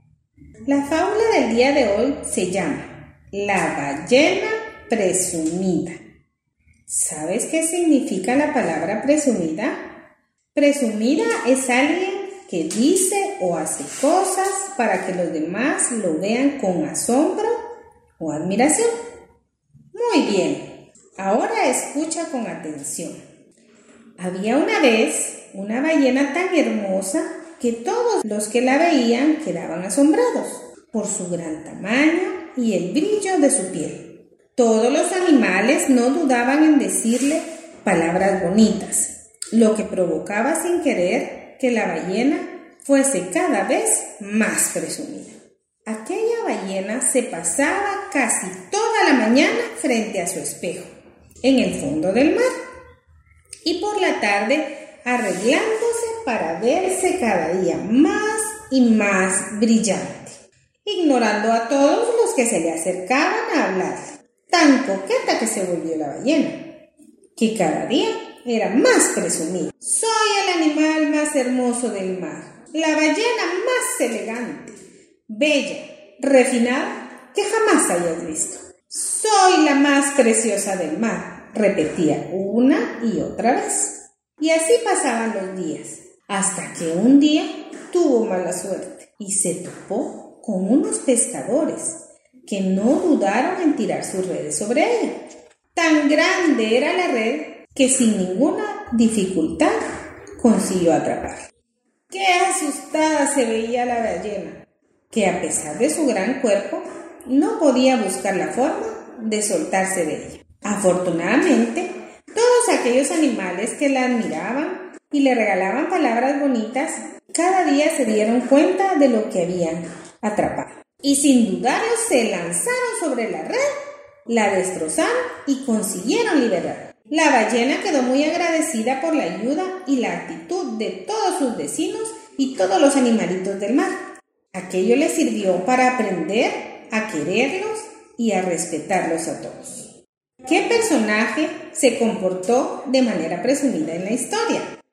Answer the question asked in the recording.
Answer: Muy bien, era la ballena.